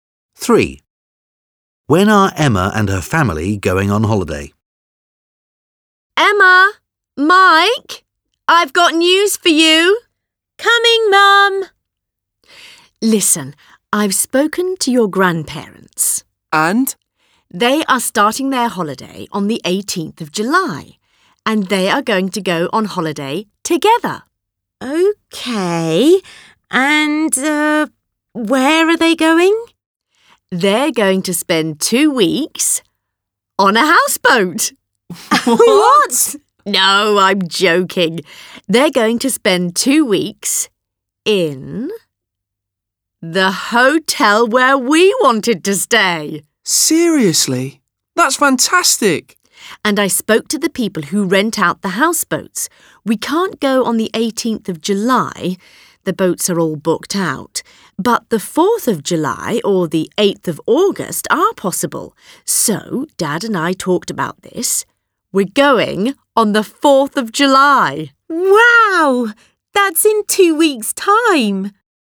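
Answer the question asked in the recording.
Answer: On the 4th of July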